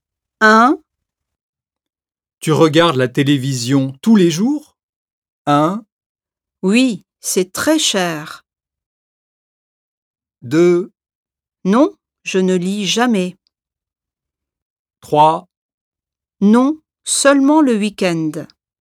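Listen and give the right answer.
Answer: 3: Non, seulement le week-end.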